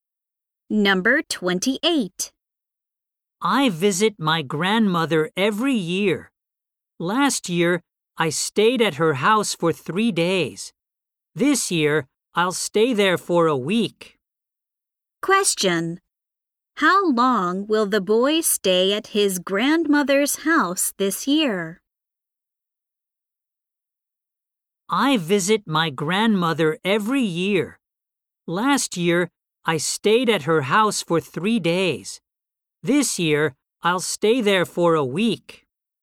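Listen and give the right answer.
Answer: For a week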